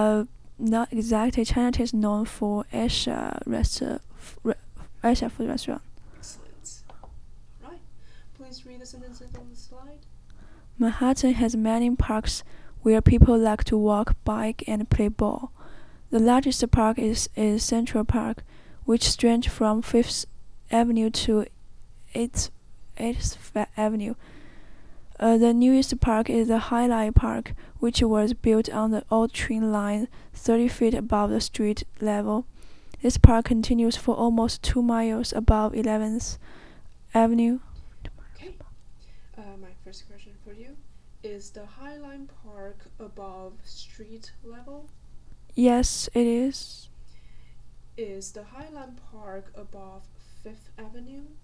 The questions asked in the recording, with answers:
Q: is the High Line Park above street level?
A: Yes, it is.

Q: Is the Highland Park above 5th Avenue?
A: No. It is above 11th Avenue.